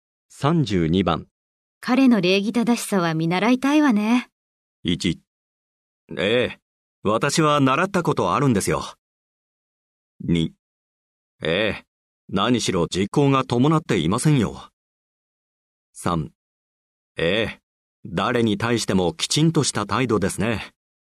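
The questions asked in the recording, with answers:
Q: 彼の礼儀正しさは見習いたいわね。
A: 3: ええ。誰に対してもきちんとした態度ですね。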